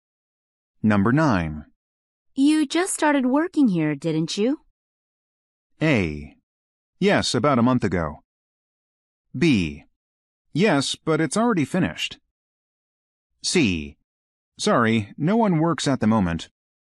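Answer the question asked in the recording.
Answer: A: Yes, about a month ago.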